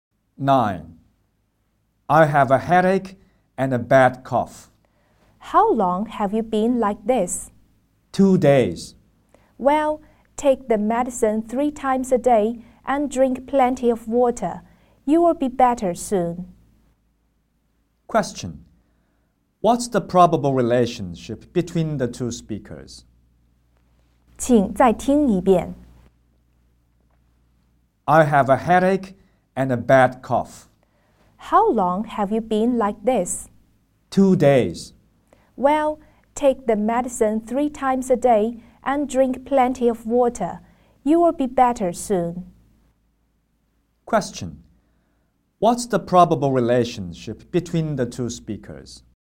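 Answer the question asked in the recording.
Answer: Doctor and patient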